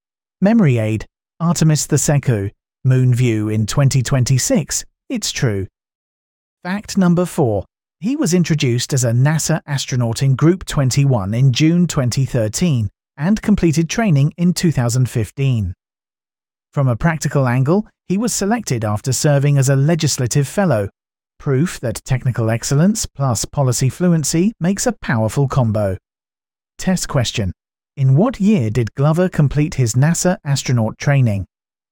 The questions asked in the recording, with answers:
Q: In what year did Glover complete his NASA astronaut training?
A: 2015.